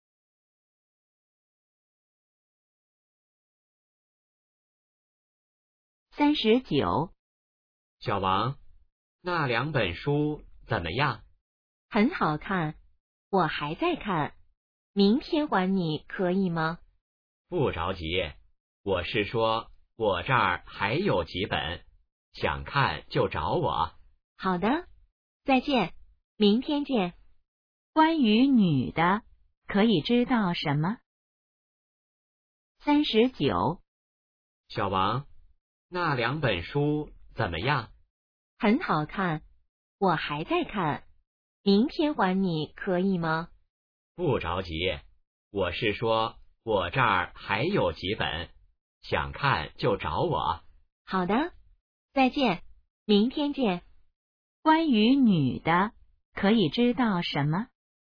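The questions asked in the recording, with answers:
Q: 关于女的,可以知道什么?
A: 书还没看完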